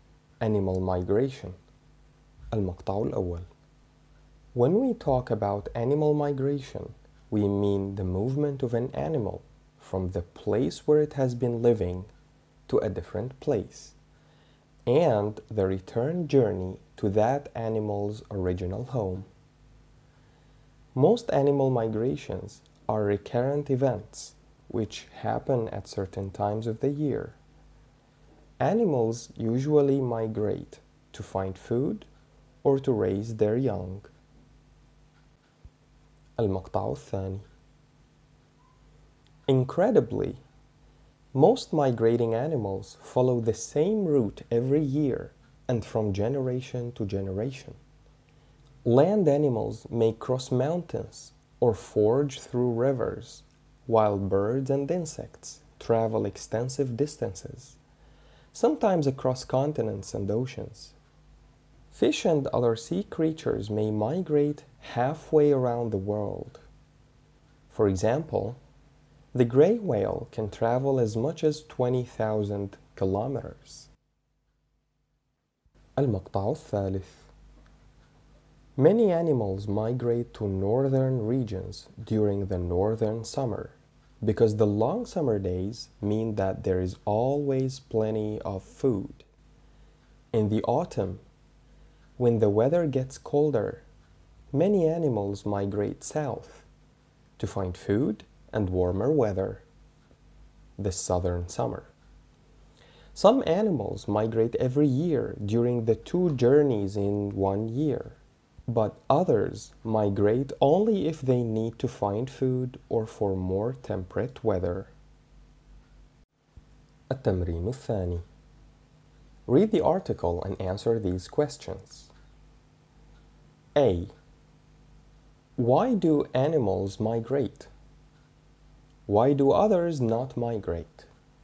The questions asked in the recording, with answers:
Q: Why do animals migrate?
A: The answer is animals migrate to find food or to raise their young.